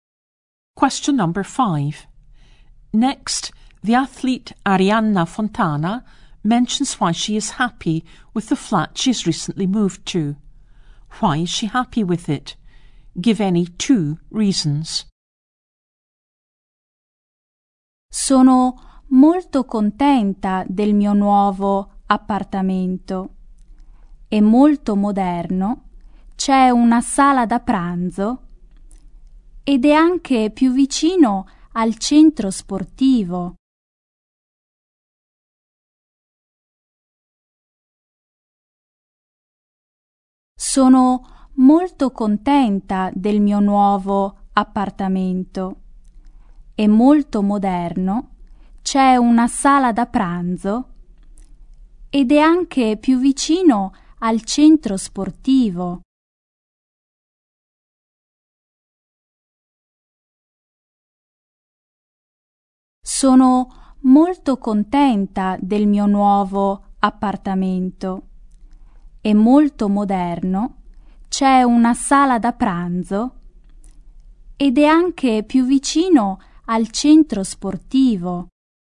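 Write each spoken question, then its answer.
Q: Why is she happy with it?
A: It is very modern, has a dining room, and is closer to the sports centre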